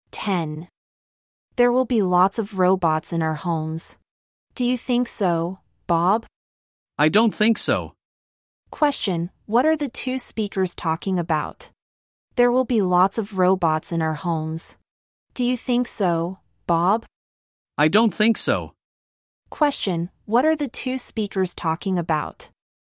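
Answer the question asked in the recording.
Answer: Robots in homes in the future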